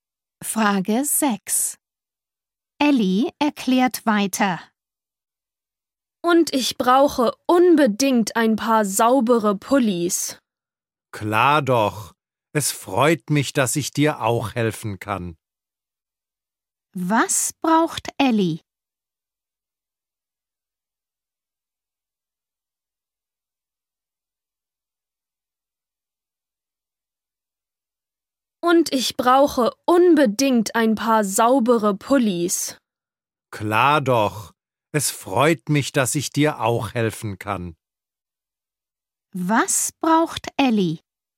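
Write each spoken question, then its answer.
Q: Was braucht Ellie?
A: saubere Pullis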